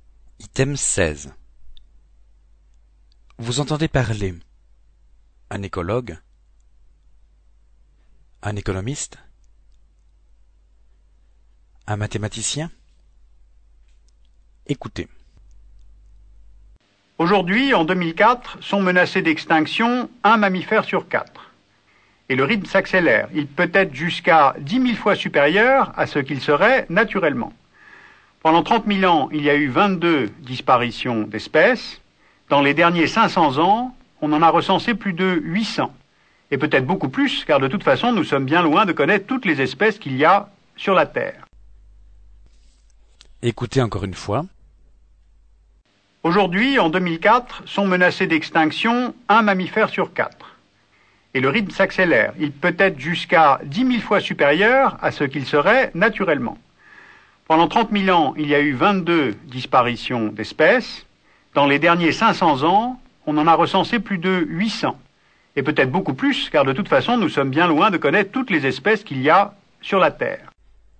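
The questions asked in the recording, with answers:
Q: Vous entendez parler un écologue, un économiste, un mathématicien.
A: un écologue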